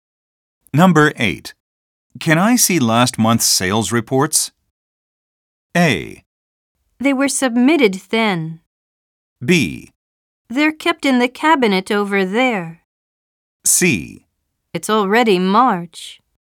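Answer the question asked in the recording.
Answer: B: They're kept in the cabinet over there.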